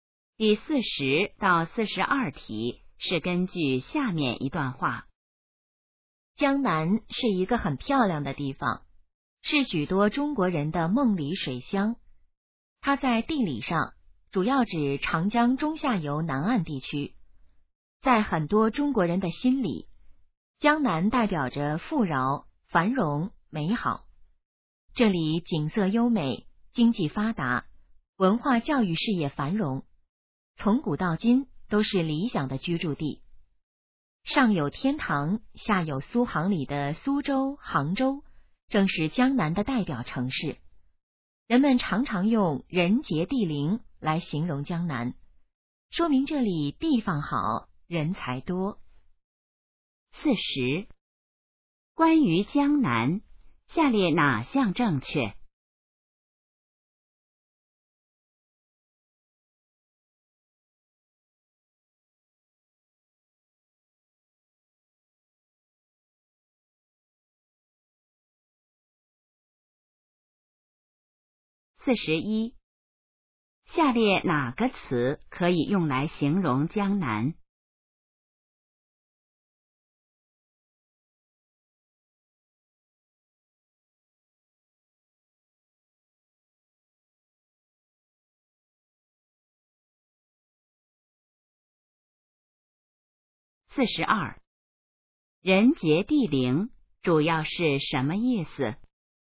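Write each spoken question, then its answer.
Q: 人杰地灵主要是什么意思?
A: 地方好,人才多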